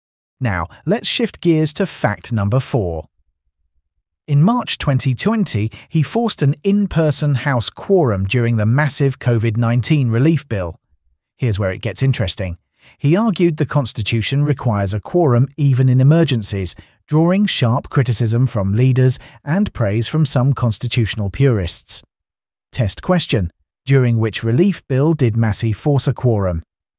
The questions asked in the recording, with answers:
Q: During which relief bill did Massie force a quorum?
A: The COVID-19 relief bill.